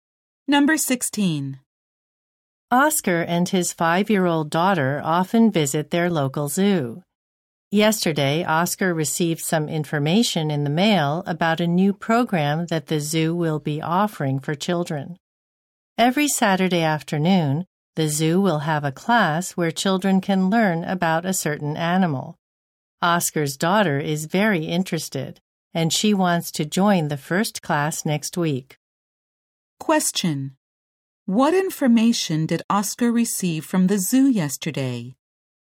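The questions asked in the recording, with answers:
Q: What information did Oscar receive from the zoo yesterday?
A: About a new Saturday class for children to learn about an animal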